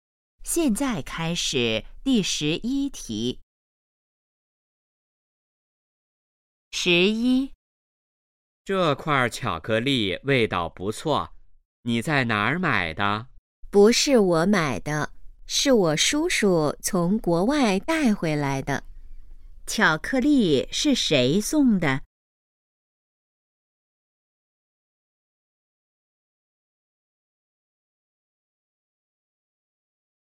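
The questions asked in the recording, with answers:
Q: 巧克力是谁送的?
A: 叔叔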